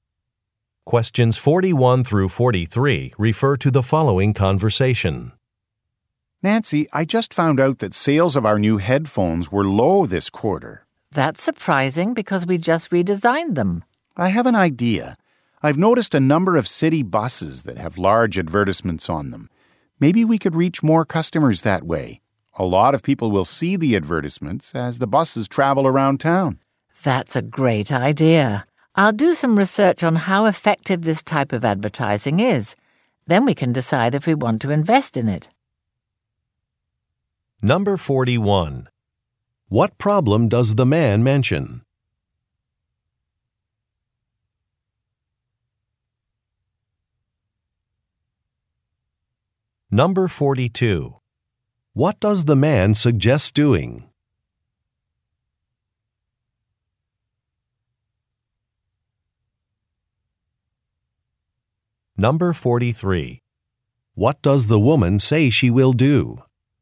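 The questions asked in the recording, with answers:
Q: What problem does the man mention?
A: Low sales of the new headphones

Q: What does the man suggest doing?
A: Advertising on city buses

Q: What does the woman say she will do?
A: Research how effective the advertising is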